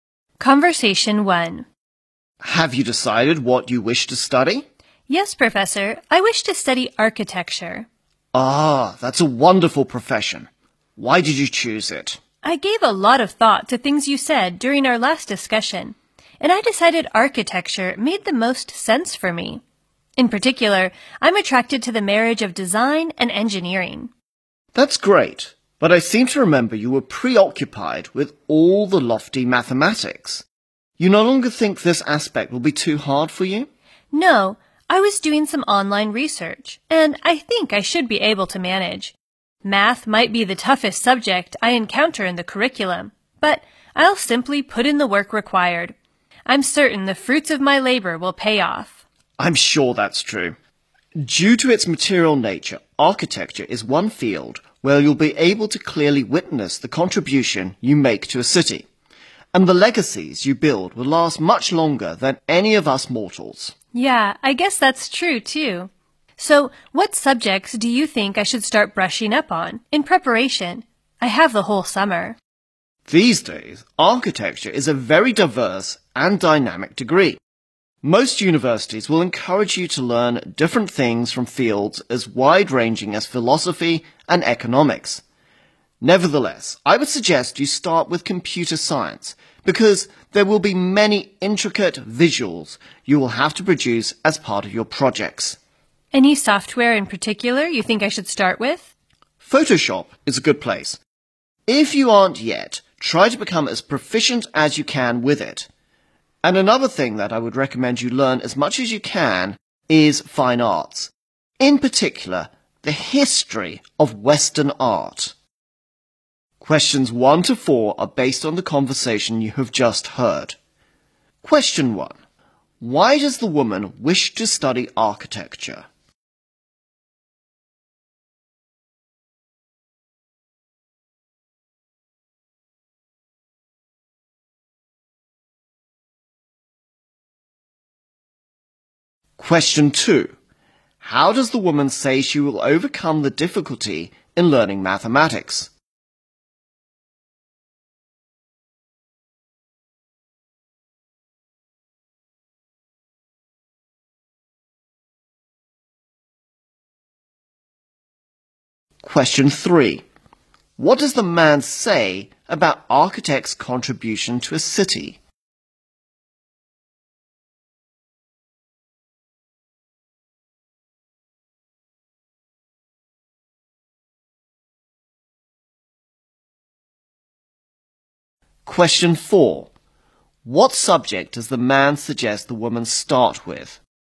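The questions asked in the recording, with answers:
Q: Why does the woman wish to study architecture?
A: She is attracted to the marriage of design and engineering.

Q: How does the woman say she will overcome the difficulty in learning mathematics?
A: By simply putting in the work required.

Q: What does the man say about architects' contribution to a city?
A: It can be clearly witnessed and lasts much longer than people do.

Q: What subject does the man suggest the woman start with?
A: Computer science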